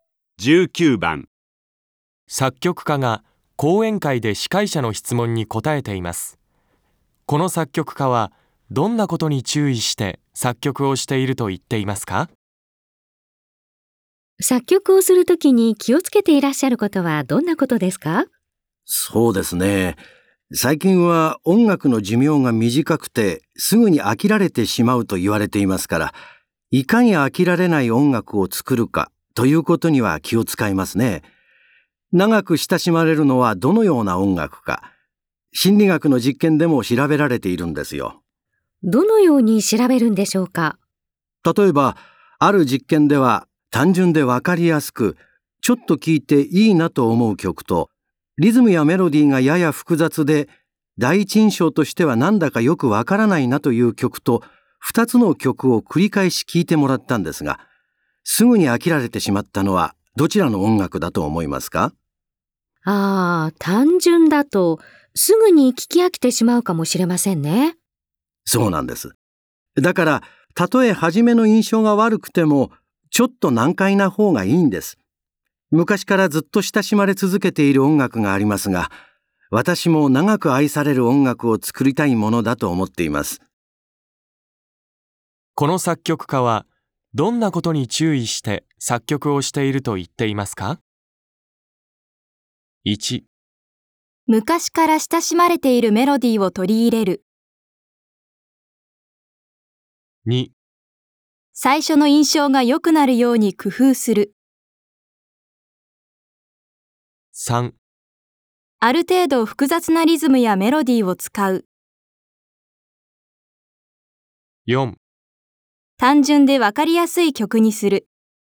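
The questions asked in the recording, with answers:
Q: この作曲家はどんなことに注意して作曲をしていると言っていますか?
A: 3: ある程度複雑なリズムやメロディーを使う。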